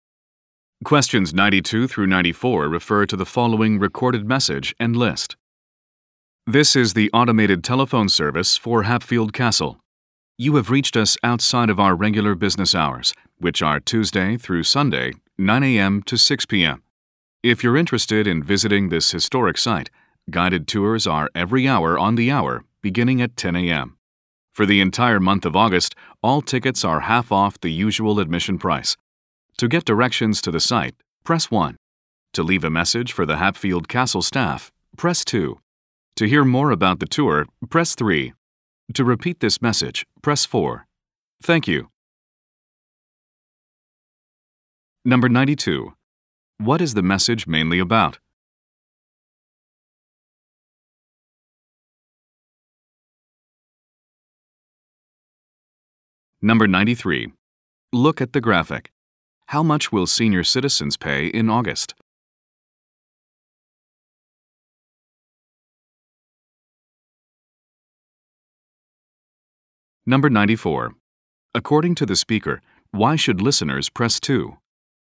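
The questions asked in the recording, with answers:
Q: What is the message mainly about?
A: Information about visiting Hatfield Castle

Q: According to the speaker, why should listeners press 2?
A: To leave a message for the staff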